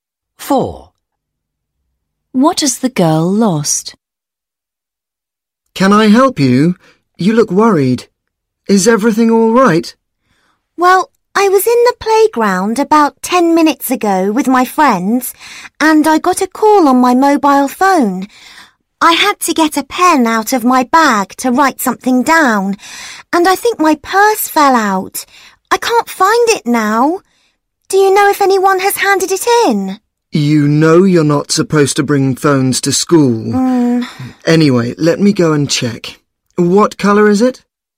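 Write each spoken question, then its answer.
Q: What has the girl lost?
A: Her purse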